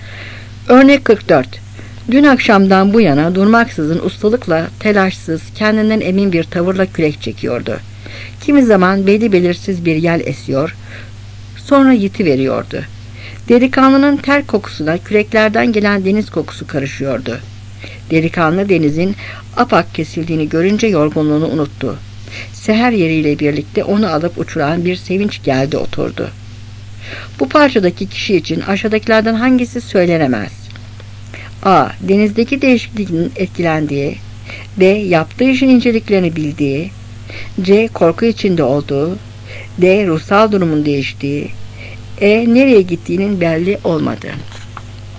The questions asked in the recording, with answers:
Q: Bu parçadaki kişi için aşağıdakilerden hangisi söylenemez?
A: Cevap C.